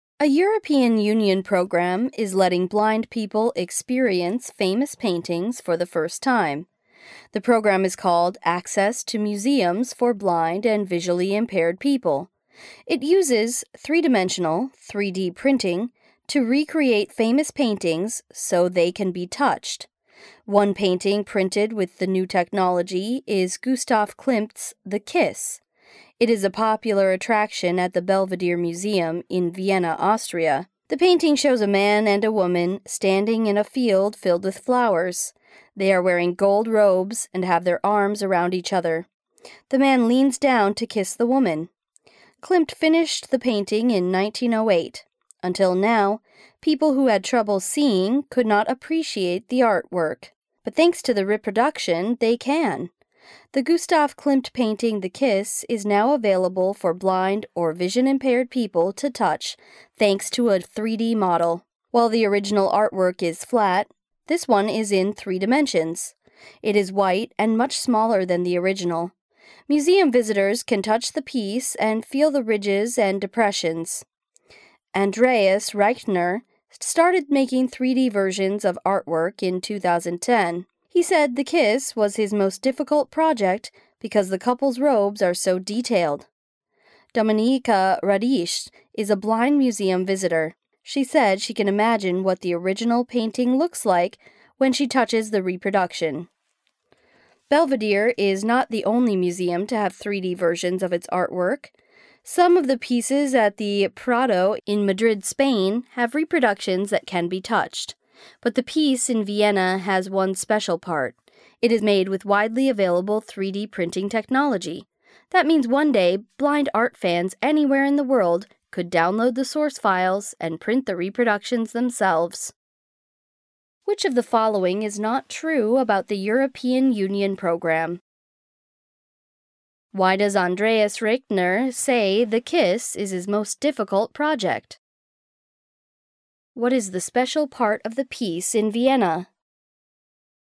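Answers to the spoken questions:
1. Because the couple's robes are so detailed.
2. It is made with widely available 3D printing technology, so blind people anywhere could one day print it themselves.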